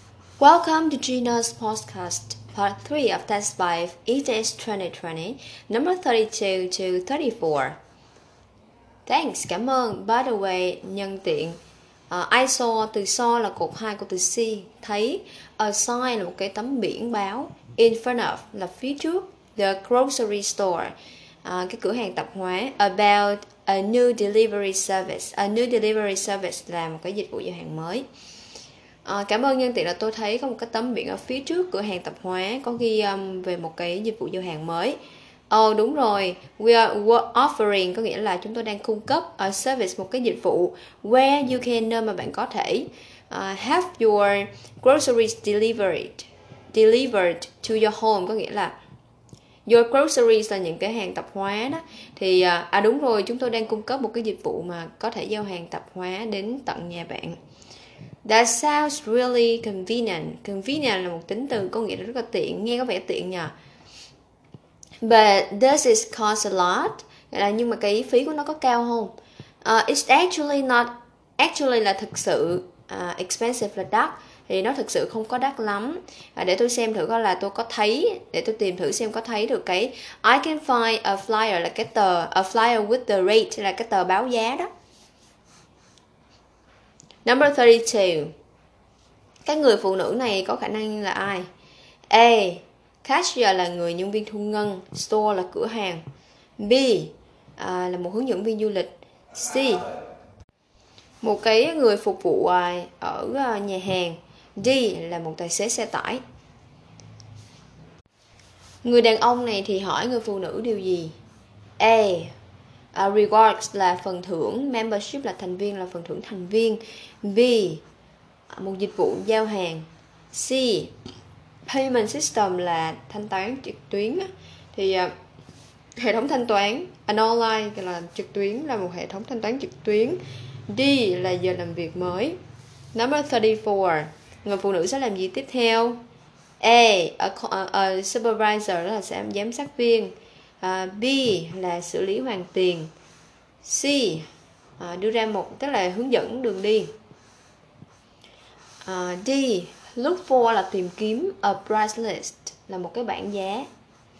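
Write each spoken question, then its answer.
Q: Người đàn ông này thì hỏi người phụ nữ điều gì?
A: B: Một dịch vụ giao hàng

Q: Người phụ nữ sẽ làm gì tiếp theo?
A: D: Tìm kiếm một cái bảng giá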